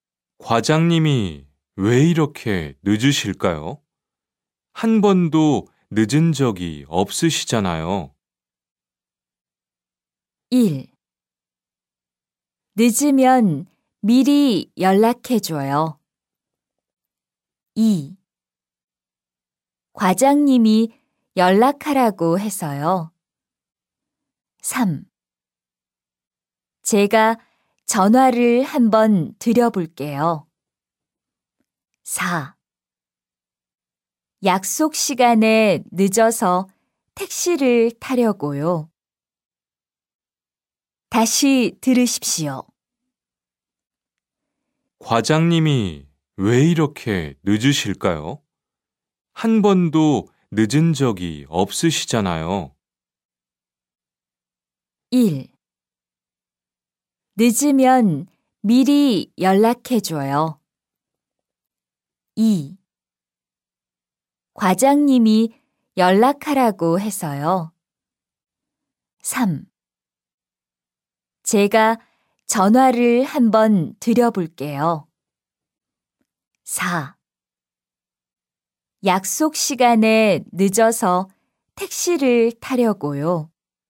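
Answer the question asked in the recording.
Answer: 3: 제가 전화를 한번 드려볼게요.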